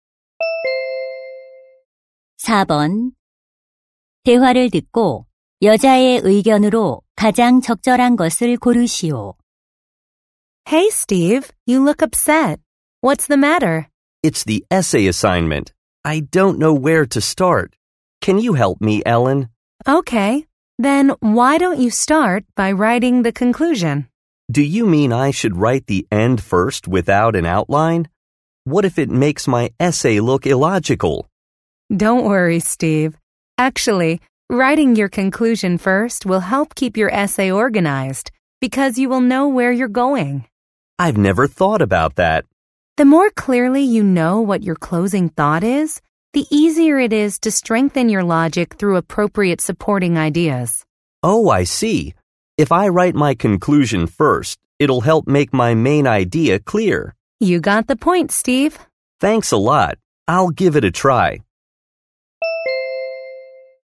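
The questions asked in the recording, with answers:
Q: 대화를 듣고 여자의 의견으로 가장 적절한 것을 고르시오.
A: 에세이를 쓸 때 결론을 먼저 쓰면 글을 체계적으로 구성하는 데 도움이 된다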